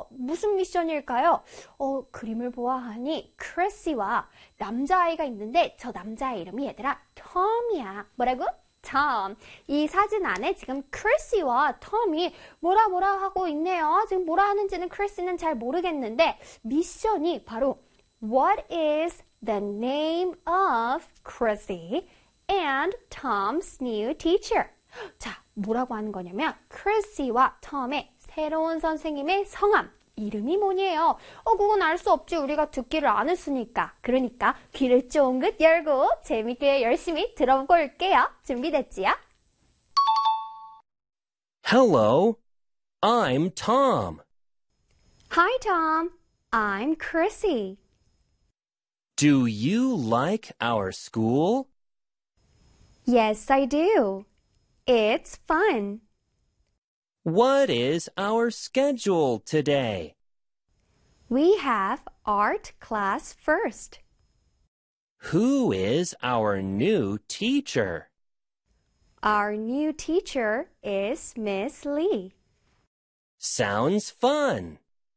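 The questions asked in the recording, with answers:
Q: What is the name of Chrissy and Tom's new teacher?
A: Miss Lee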